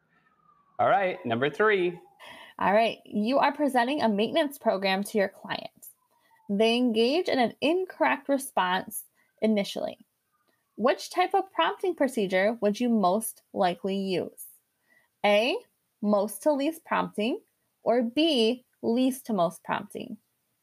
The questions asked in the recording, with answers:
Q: Which type of prompting procedure would you most likely use?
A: So that one would be least to most prompting.